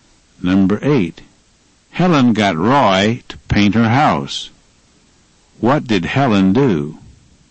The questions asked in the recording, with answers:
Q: What did Helen do?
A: She got Roy to paint her house.